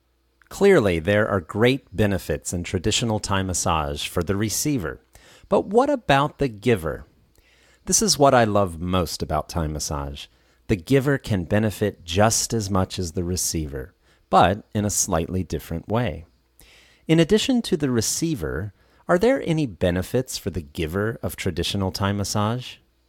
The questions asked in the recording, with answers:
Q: In addition to the receiver, are there any benefits for the giver of traditional Thai massage?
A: Yes, there are. The giver can benefit just as much as the receiver.